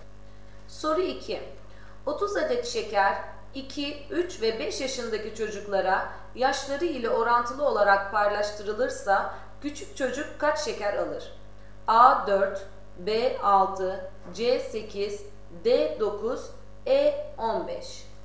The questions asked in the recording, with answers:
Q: 30 adet şeker 2, 3 ve 5 yaşındaki çocuklara yaşları ile orantılı olarak paylaştırılırsa küçük çocuk kaç şeker alır?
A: Doğru cevap B 6.